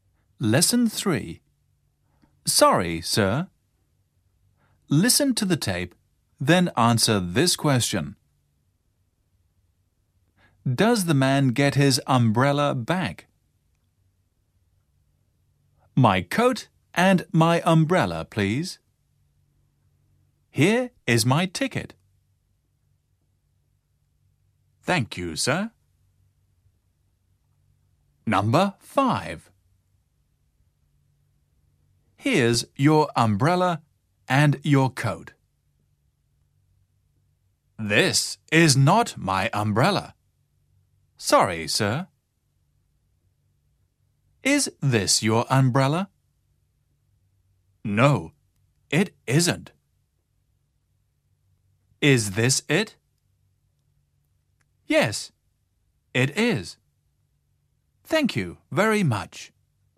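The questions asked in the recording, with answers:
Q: Does the man get his umbrella back?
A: Yes, he does.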